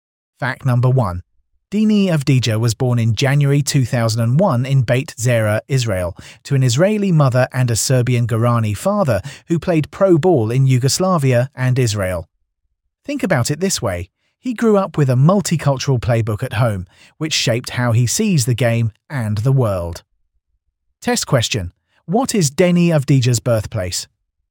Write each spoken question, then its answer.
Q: What is Denny Avdija's birthplace?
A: Correct answer, Beit Zera, Israel.